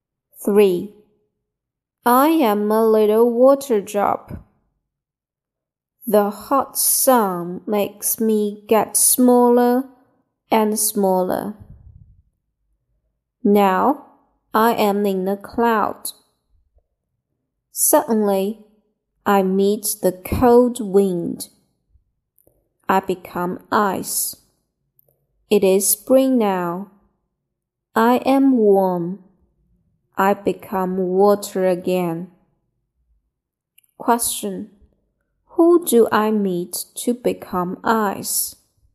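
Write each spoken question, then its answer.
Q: Who do I meet to become ice?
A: The cold wind.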